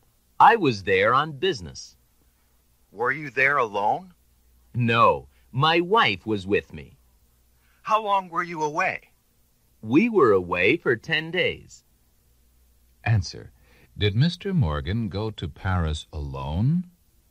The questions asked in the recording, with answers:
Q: Did Mr. Morgan go to Paris alone?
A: No, he didn't.